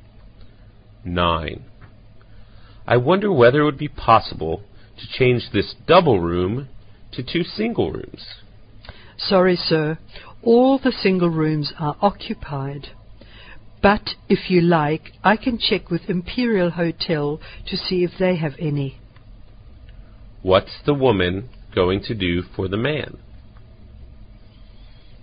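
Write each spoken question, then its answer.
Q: What's the woman going to do for the man?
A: Check with Imperial Hotel for single rooms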